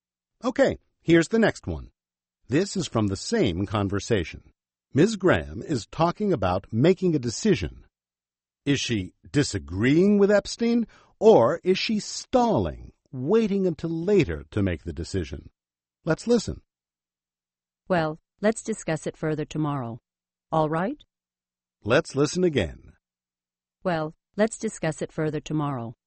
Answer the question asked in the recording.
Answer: She's stalling.